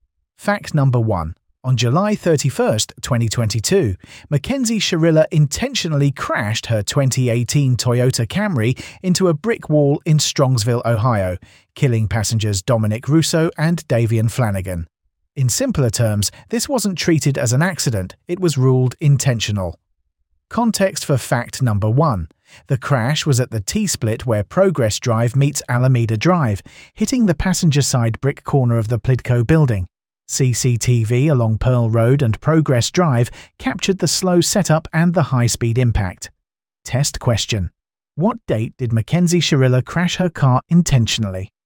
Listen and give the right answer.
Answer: Correct answer, July 31st, 2022.